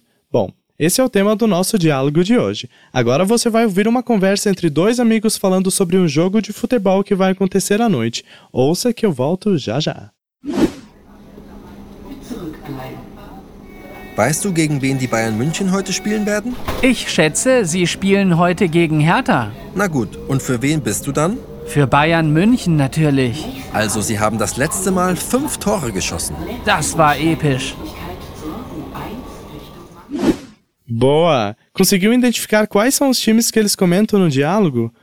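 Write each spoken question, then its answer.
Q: Conseguiu identificar quais são os times que eles comentam no diálogo?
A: Bayern de Munique (Bayern München) e Hertha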